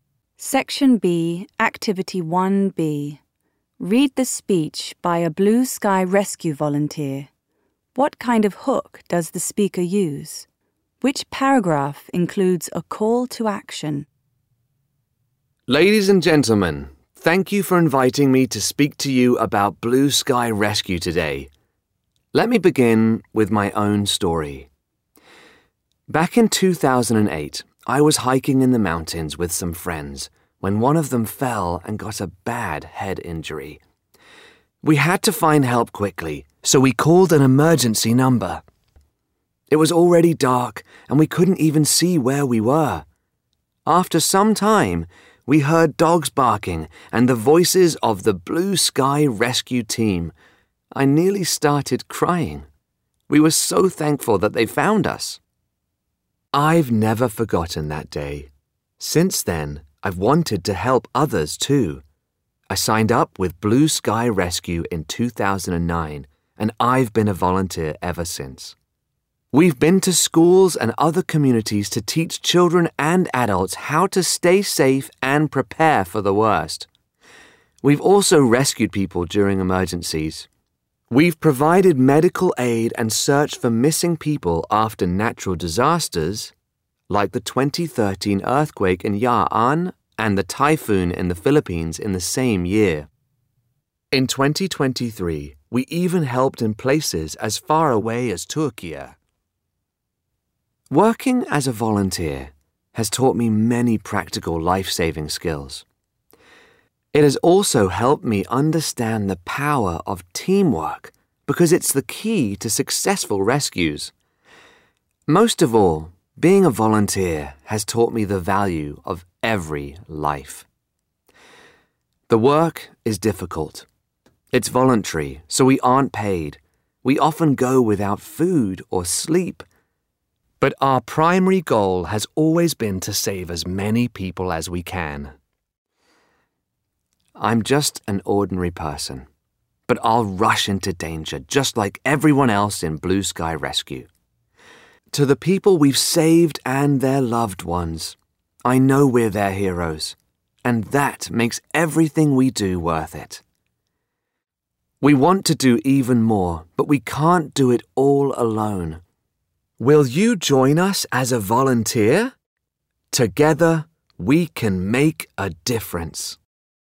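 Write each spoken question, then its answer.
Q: What kind of hook does the speaker use?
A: A personal story (the speaker's own rescue experience in 2008)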